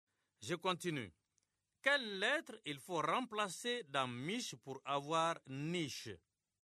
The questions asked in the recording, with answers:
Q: Quelle lettre il faut remplacer dans miche pour avoir niche?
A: Monsieur, c'est la lettre M.